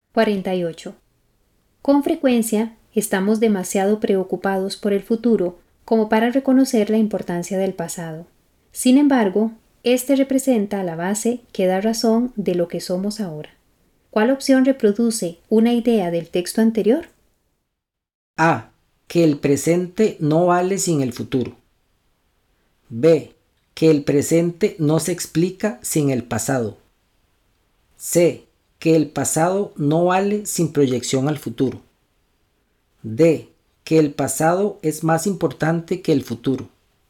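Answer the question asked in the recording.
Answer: B: Que el presente no se explica sin el pasado.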